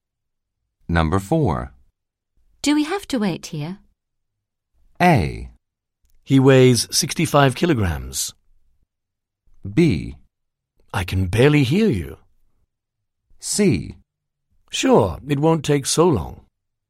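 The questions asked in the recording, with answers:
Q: Do we have to wait here?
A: C: Sure, it won't take so long.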